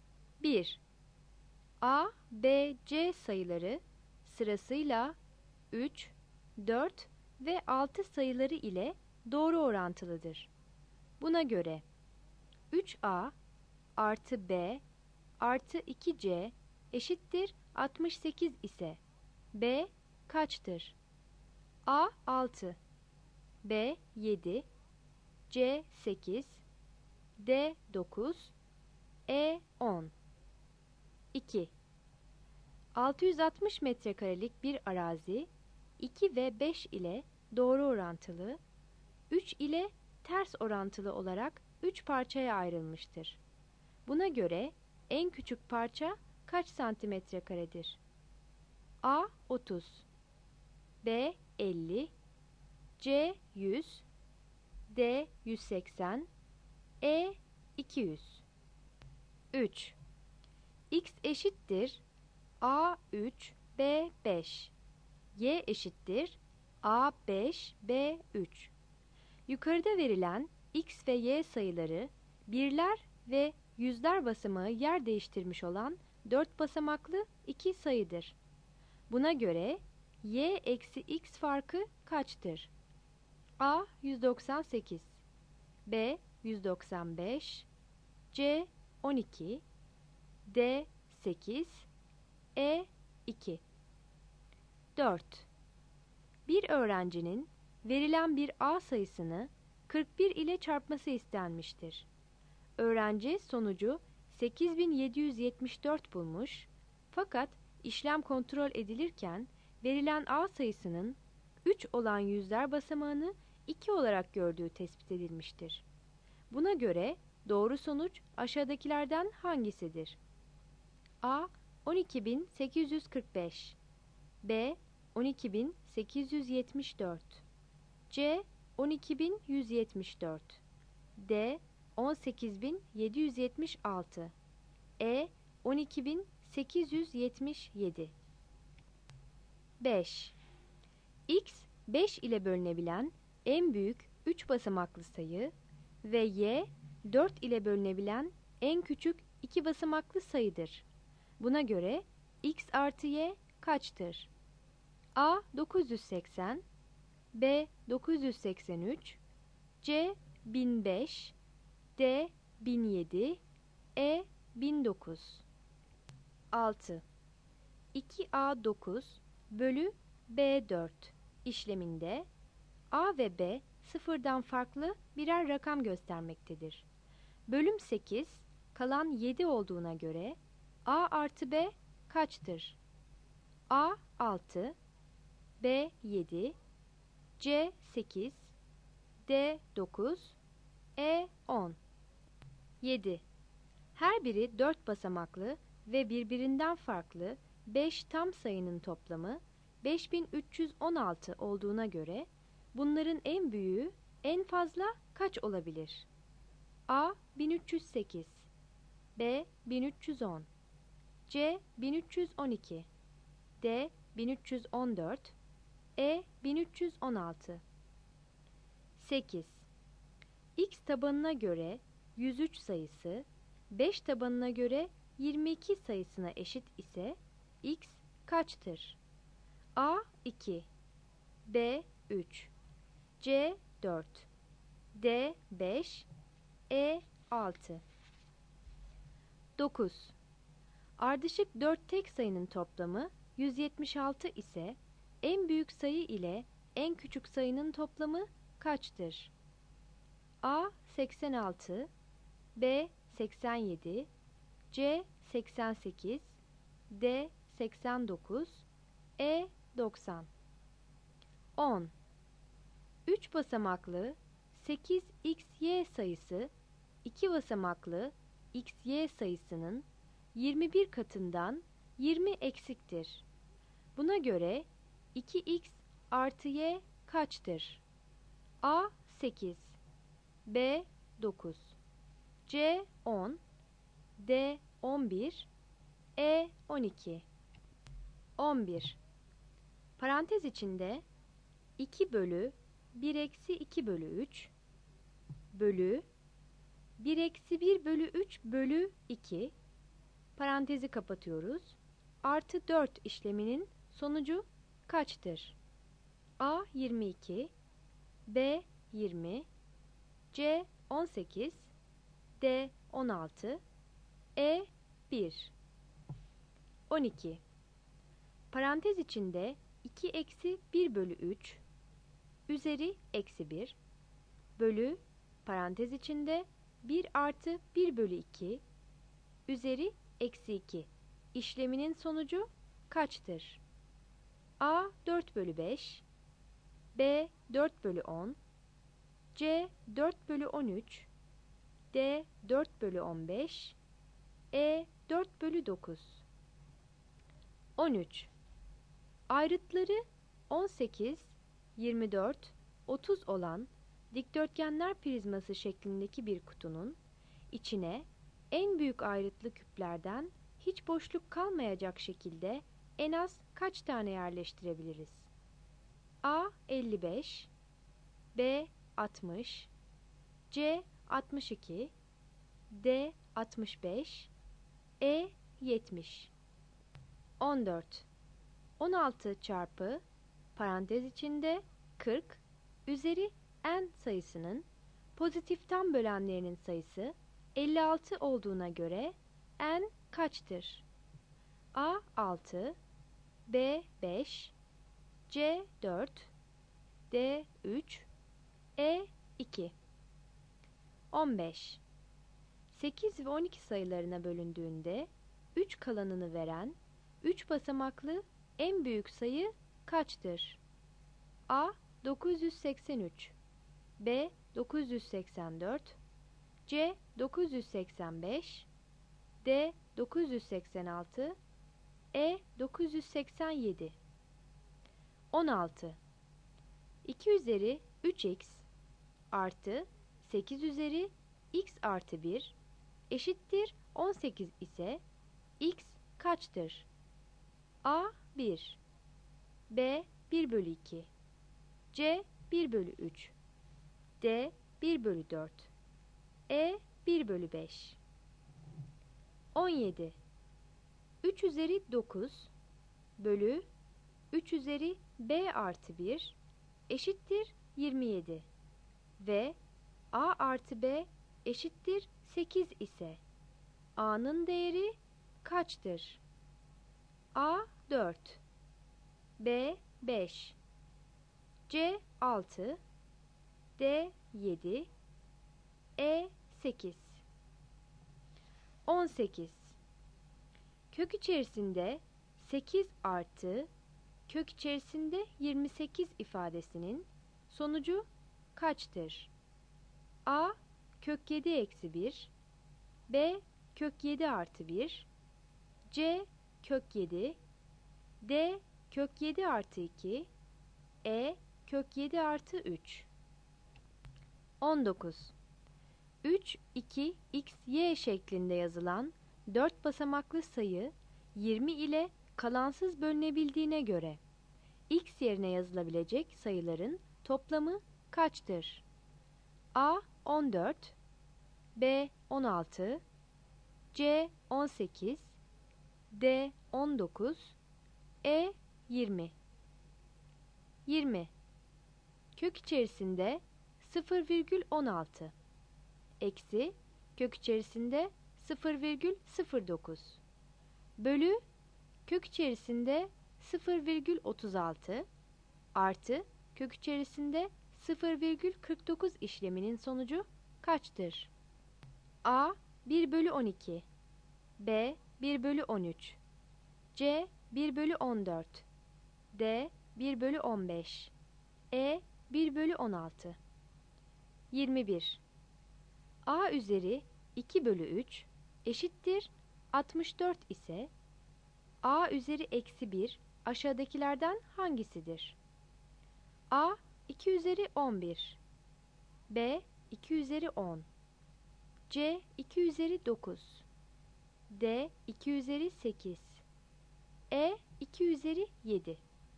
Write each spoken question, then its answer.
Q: Buna göre en küçük parça kaç santimetre karedir?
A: 2 A

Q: Buna göre Y eksi X farkı kaçtır?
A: 3 A

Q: Buna göre doğru sonuç aşağıdakilerden hangisidir?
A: 4 B

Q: Buna göre X artı Y kaçtır?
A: 5 D

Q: Bölüm 8, kalan 7 olduğuna göre A artı B kaçtır?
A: 6 E

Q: Her biri 4 basamaklı ve birbirinden farklı 5 tam sayının toplamı 5316 olduğuna göre bunların en büyüğü en fazla kaç olabilir?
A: 7 B

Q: X tabanına göre 103 sayısı 5 tabanına göre 22 sayısına eşit ise X kaçtır?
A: 8 B

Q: Ardışık 4 tek sayının toplamı 176 ise en büyük sayı ile en küçük sayının toplamı kaçtır?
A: 9 C

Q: Buna göre 2X artı Y kaçtır?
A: 10 B

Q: Ayrıtları 18, 24, 30 olan dikdörtgenler prizması şeklindeki bir kutunun içine en büyük ayrıtlı küplerden hiç boşluk kalmayacak şekilde en az kaç tane yerleştirebiliriz?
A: 13 B

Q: 8 ve 12 sayılarına bölündüğünde 3 kalanını veren 3 basamaklı en büyük sayı kaçtır?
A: 15 E

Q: 2 üzeri 3x artı 8 üzeri x artı 1 eşittir 18 ise x kaçtır?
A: 16 C

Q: Kök içerisinde 8 artı kök içerisinde 28 ifadesinin sonucu kaçtır?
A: 18 B

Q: 3, 2, x, y şeklinde yazılan 4 basamaklı sayı 20 ile kalansız bölünebildiğine göre x yerine yazılabilecek sayıların toplamı kaçtır?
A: 19 E

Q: Kök içerisinde 0,16 eksi kök içerisinde 0,09 bölü kök içerisinde 0,36 artı kök içerisinde 0,49 işleminin sonucu kaçtır?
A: 20 B